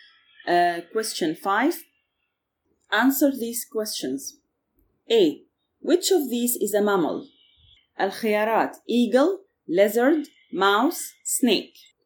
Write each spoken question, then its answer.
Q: Which of these is a mammal?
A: الجواب mouse.